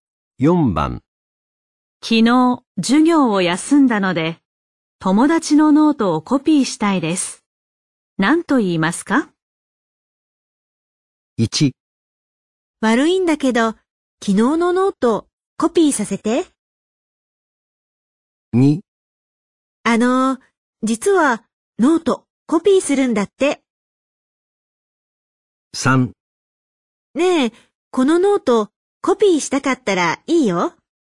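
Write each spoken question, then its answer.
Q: 何と言いますか?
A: 1: 悪いんだけど昨日のノートコピーさせて。

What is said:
昨日、授業を休んだので、友達のノートをコピーしたいです。
1. 悪いんだけど、昨日のノート、コピーさせて。
2. あのう、実は、ノート、コピーするんだって。
3. ねえ、このノート、コピーしたかったらいいよ。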